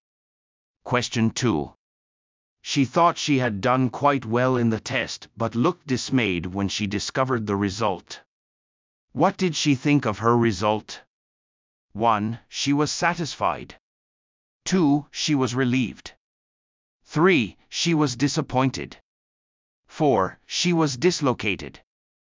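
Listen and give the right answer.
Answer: 3: She was disappointed.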